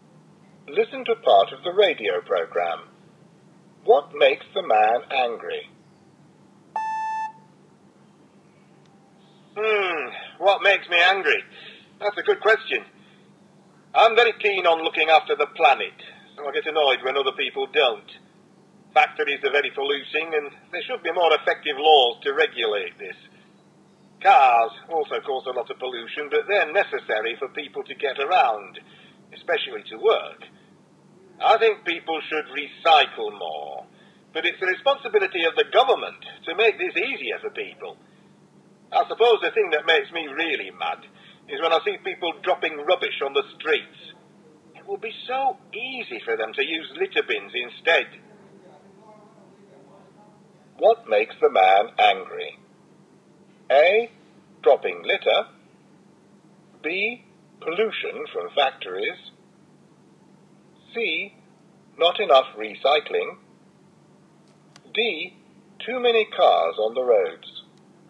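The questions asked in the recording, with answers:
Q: What makes the man angry?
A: A: Dropping litter.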